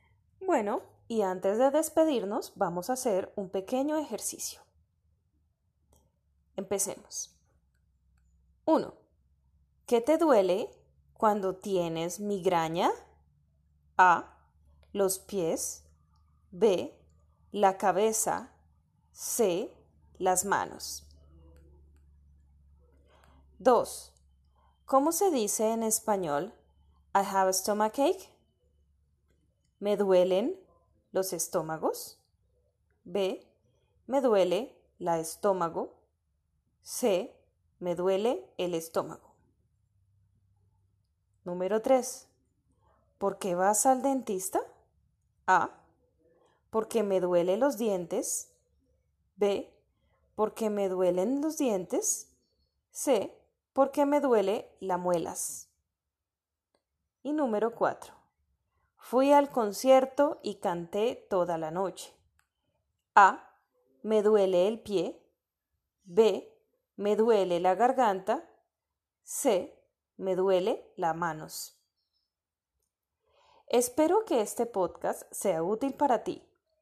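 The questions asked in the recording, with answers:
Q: ¿Qué te duele cuando tienes migraña?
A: B: La cabeza.

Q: ¿Cómo se dice en español I have a stomachache?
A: C: Me duele el estómago.

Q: ¿Por qué vas al dentista?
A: B: Porque me duelen los dientes.

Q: Fui al concierto y canté toda la noche.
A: B: Me duele la garganta.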